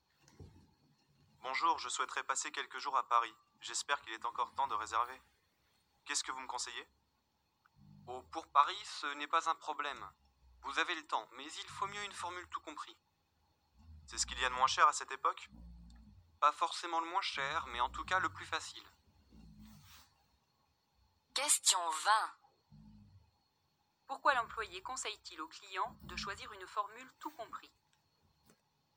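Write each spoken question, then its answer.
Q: Pourquoi l'employé conseille-t-il au client de choisir une formule tout compris?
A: Parce que c'est le plus facile (pas forcément le moins cher).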